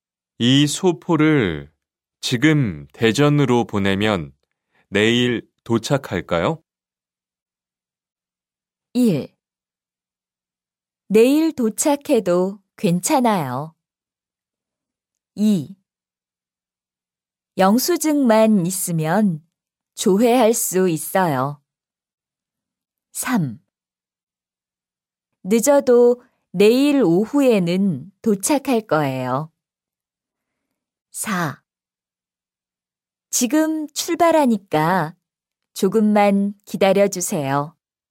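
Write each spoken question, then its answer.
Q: 이 소포를 지금 대전으로 보내면 내일 도착할까요?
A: 3: 늦어도 내일 오후에는 도착할 거예요.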